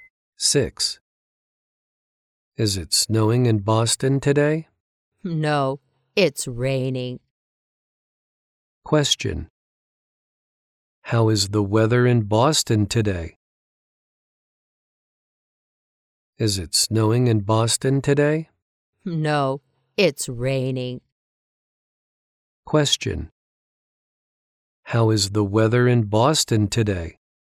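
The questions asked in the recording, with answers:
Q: How is the weather in Boston today?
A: It's raining.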